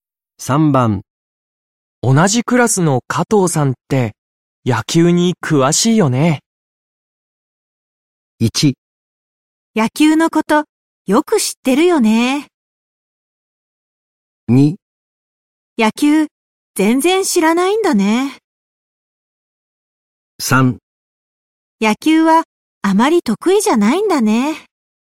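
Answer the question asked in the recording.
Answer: 1: 野球のことよく知ってるよね。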